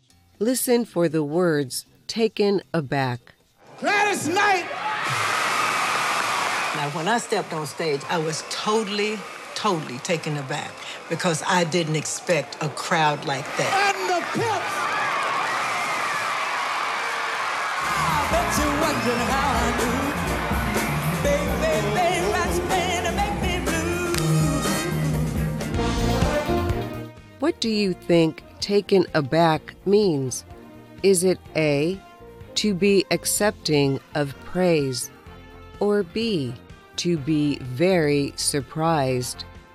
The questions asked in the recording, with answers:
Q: What do you think taken aback means?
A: The answer is B, to be very surprised.